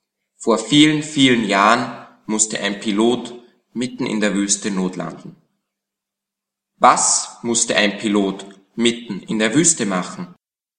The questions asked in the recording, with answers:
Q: Was musste ein Pilot mitten in der Wüste machen?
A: Notlanden. Er musste mitten in der Wüste notlanden.